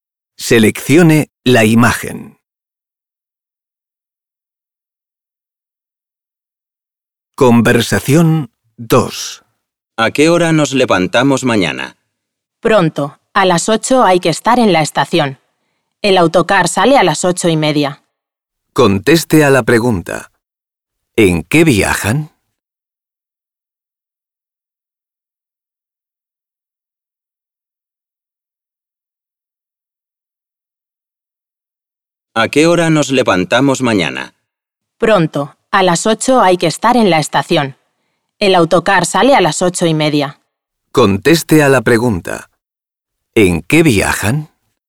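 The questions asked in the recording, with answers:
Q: ¿En qué viajan?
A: En autocar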